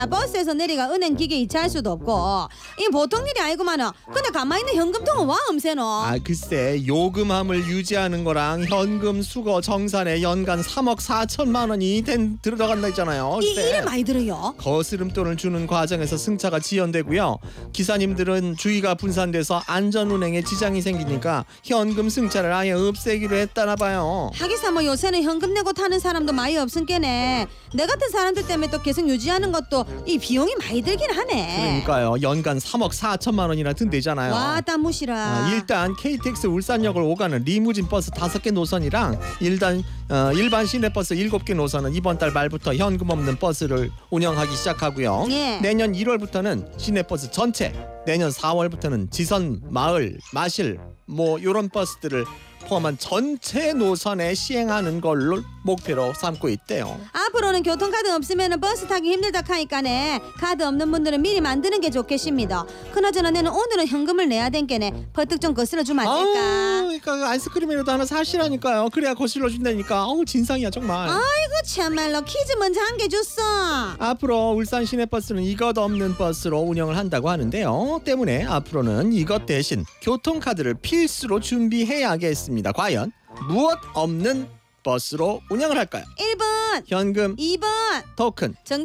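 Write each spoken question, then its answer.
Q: 과연 무엇 없는 버스로 운영을 할까요?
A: 1번: 현금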